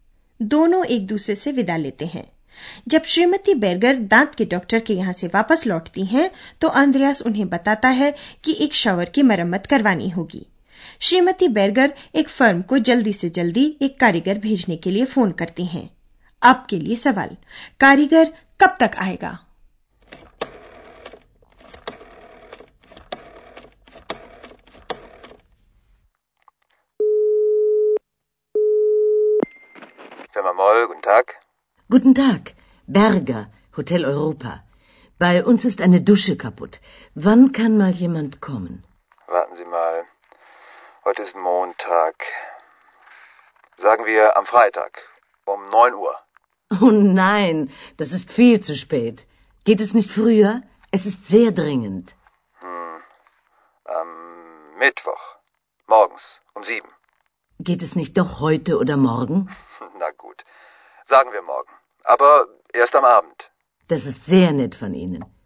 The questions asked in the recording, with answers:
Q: कारीगर कब तक आएगा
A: श्रीमती Berger को अंततः इस बात में कामयाबी मिल गई कि अगली शाम एक कारीगर आ जाएगा